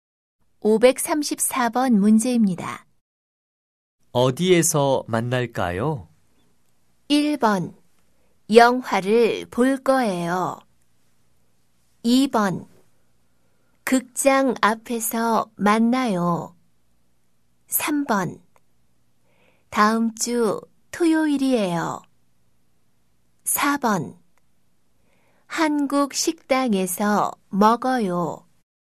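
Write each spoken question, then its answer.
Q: 어디에서 만날까요?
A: 2: 극장 앞에서 만나요.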